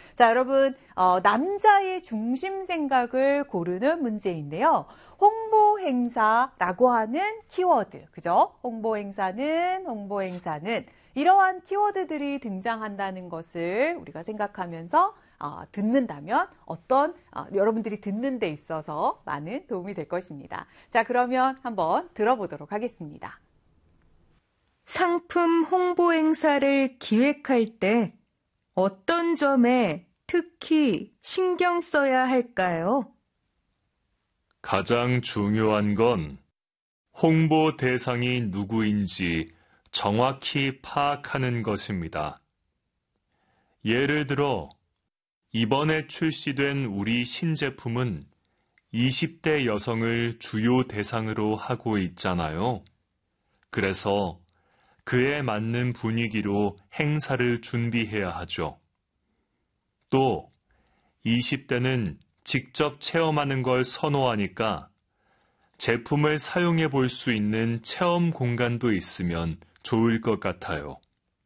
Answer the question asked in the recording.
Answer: 대상에 맞게, 여러분, 대상이 누구인지 정확히 파악해야 한다.